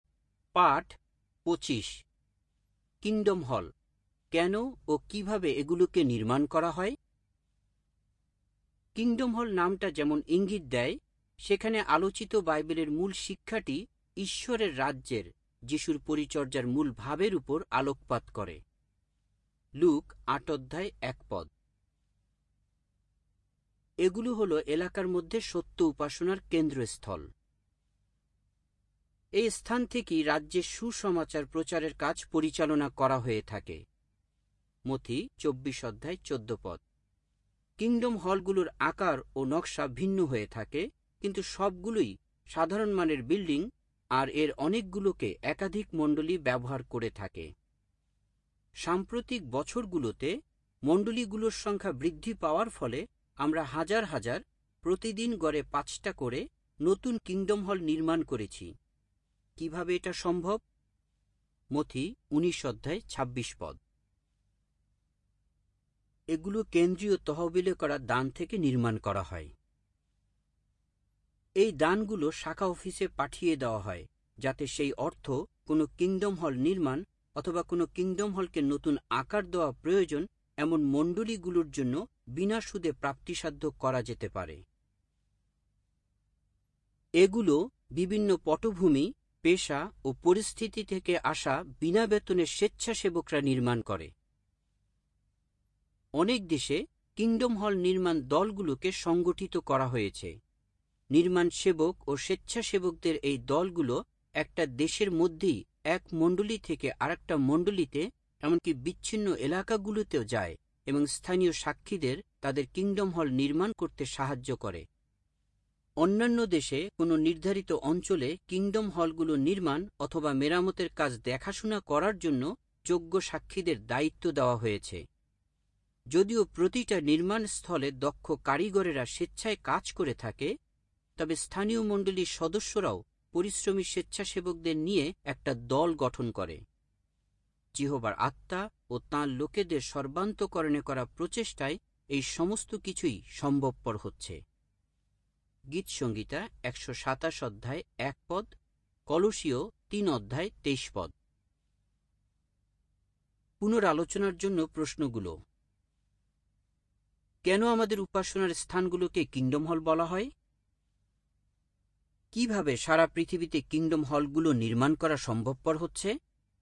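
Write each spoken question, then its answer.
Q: কেন আমাদের উপাসনার স্থানগুলোকে kingdom হল বলা হয়?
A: কারণ সেখানে আলোচিত বাইবেলের মূল শিক্ষাটি ঈশ্বরের রাজ্যের উপর আলোকপাত করে

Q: কিভাবে সারা পৃথিবীতে kingdom হলগুলো নির্মাণ করা সম্ভবপর হচ্ছে?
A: কেন্দ্রীয় তহবিলে করা দান ও বিনা বেতনের স্বেচ্ছাসেবকদের মাধ্যমে, যিহোবার আত্মার সাহায্যে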